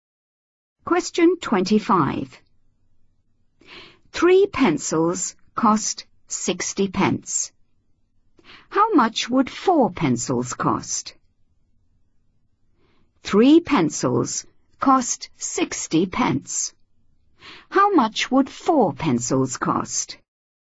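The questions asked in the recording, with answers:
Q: How much would four pencils cost?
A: 80 pence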